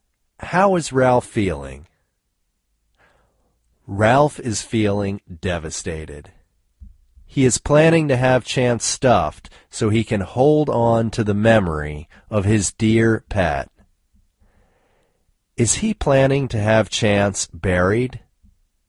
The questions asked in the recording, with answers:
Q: Is he planning to have Chance buried?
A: No, he isn't planning to have Chance buried.